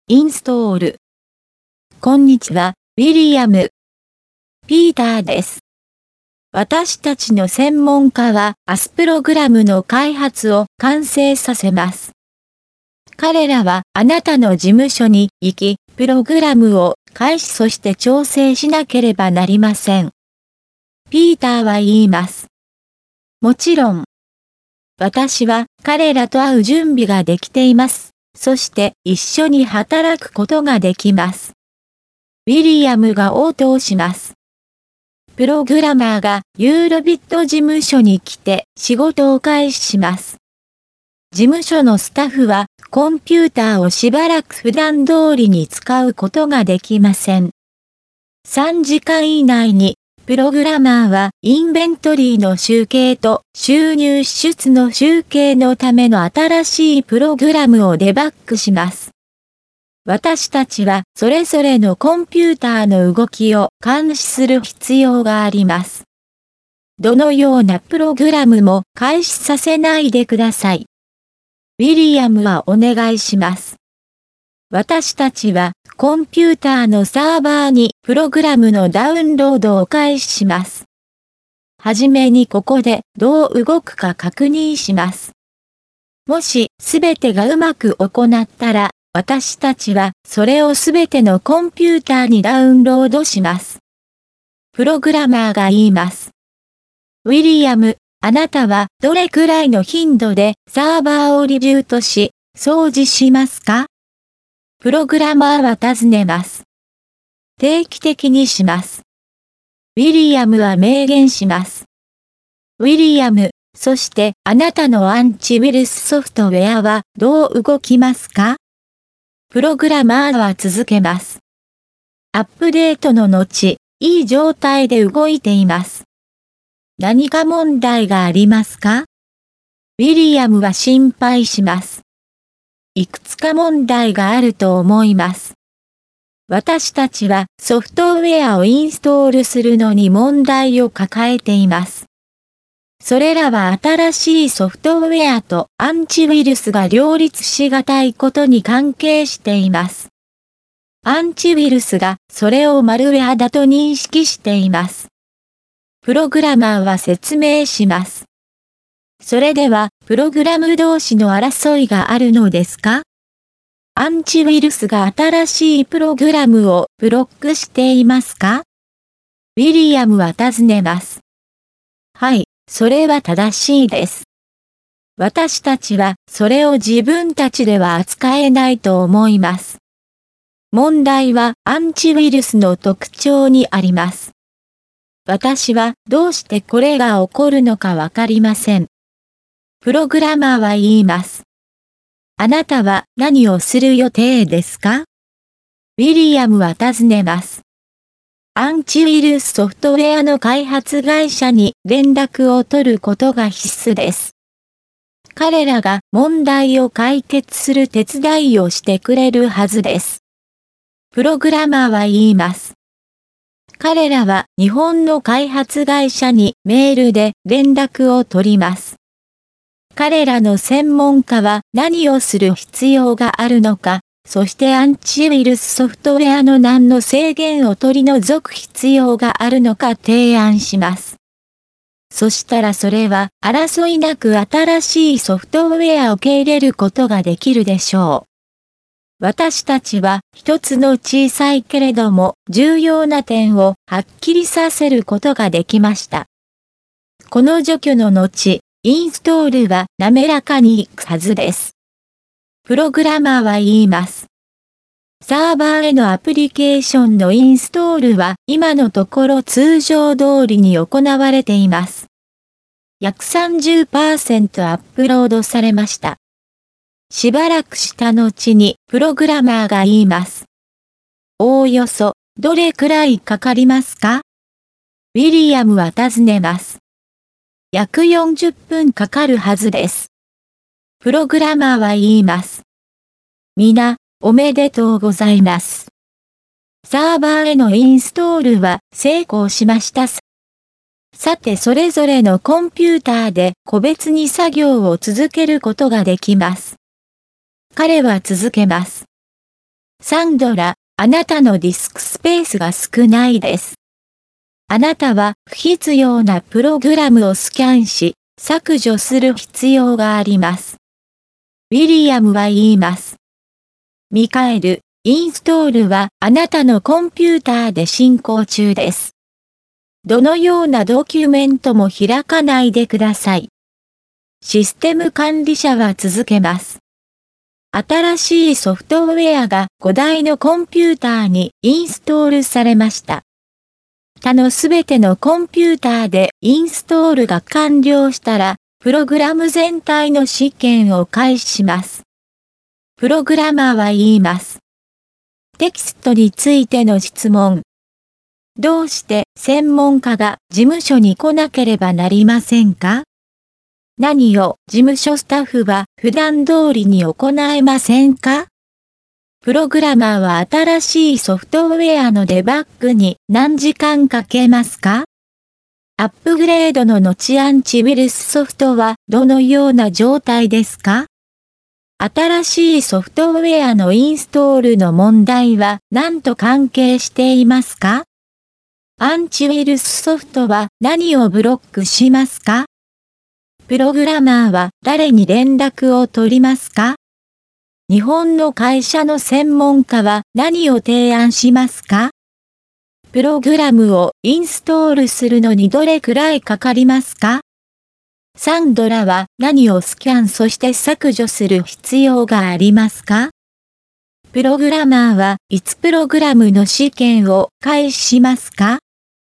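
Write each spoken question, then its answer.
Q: どうして専門家が事務所に来なければなりませんか?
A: プログラムを開始そして調整するため

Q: 何を事務所スタッフは普段通りに行えませんか?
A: コンピューターを使うこと

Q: プログラマーは新しいソフトウェアのデバッグに何時間かけますか?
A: 3時間以内

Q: アップグレードの後アンチウイルスソフトはどのような状態ですか?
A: いい状態で動いている

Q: 新しいソフトウェアのインストールの問題は何と関係していますか?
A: 新しいソフトウェアとアンチウイルスが両立しがたいこと

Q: アンチウイルスソフトは何をブロックしますか?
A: 新しいプログラム

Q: プログラマーは誰に連絡を取りますか?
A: アンチウイルスソフトウェアの日本の開発会社

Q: 日本の会社の専門家は何を提案しますか?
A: 何をする必要があるか、アンチウイルスソフトウェアのどの制限を取り除く必要があるか

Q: プログラムをインストールするのにどれくらいかかりますか?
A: 約40分

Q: サンドラは何をスキャンそして削除する必要がありますか?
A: 不必要なプログラム

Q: プログラマーはいつプログラムの試験を開始しますか?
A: 他のすべてのコンピューターでインストールが完了したら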